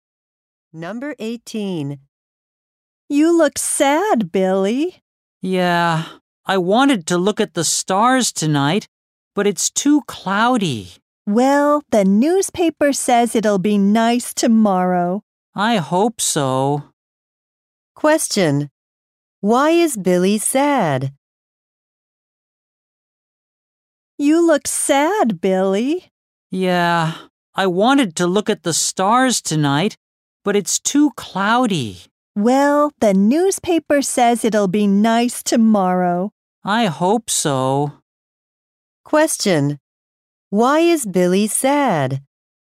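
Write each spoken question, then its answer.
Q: Why is Billy sad?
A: It's too cloudy to look at the stars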